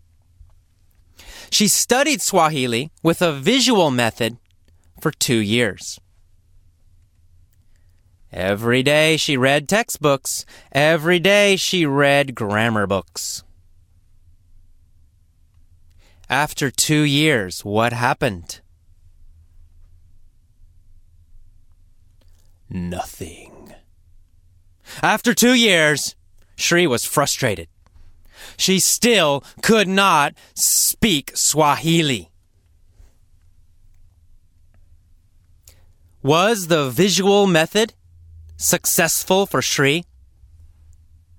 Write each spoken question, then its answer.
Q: Was the visual method successful for Sri?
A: No. It was not successful for Sri.